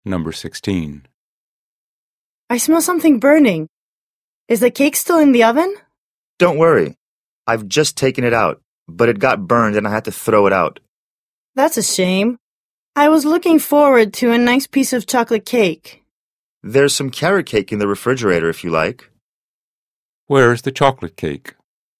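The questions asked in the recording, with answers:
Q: Where is the chocolate cake?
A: It got burned and was thrown out (in the trash).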